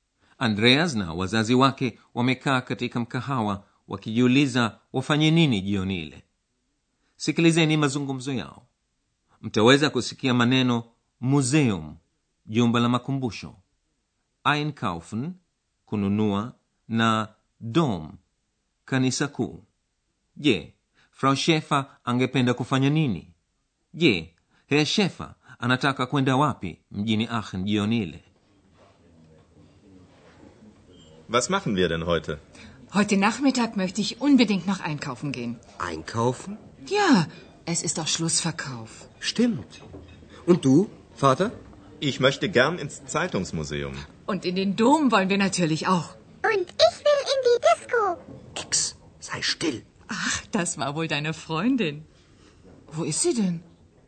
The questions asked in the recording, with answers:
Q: je frau shefer angependa kufanya nini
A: Frau Schäfer angependa kwenda madukani kununua vitu

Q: je herr shefer anataka kwenda wapi mjini aachen jioni ile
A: Herr Schäfer angependa kwenda kulizuru jumba la makumbusho ya e magazeti.